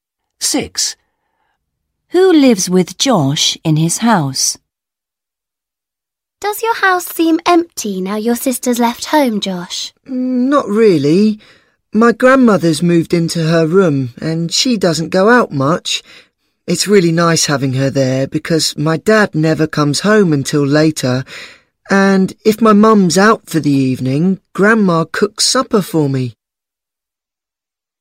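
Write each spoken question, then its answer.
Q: Who lives with Josh in his house?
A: His grandmother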